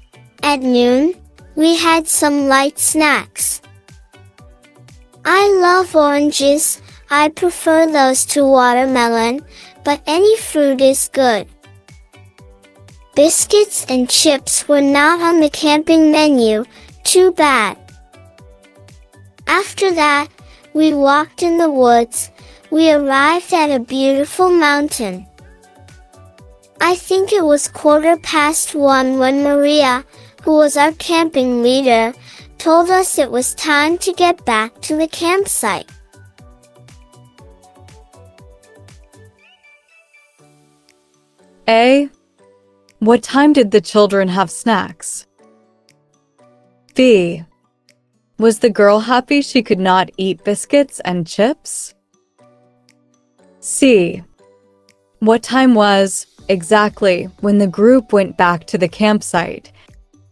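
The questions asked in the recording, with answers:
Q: What time did the children have snacks?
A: At noon

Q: Was the girl happy she could not eat biscuits and chips?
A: No

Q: What time was, exactly, when the group went back to the campsite?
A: 1:15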